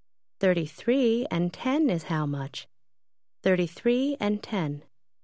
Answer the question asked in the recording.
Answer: 43.